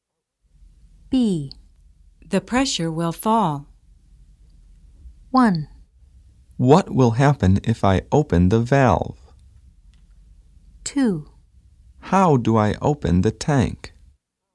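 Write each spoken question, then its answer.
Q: The pressure will fall.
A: 1: What will happen if I open the valve?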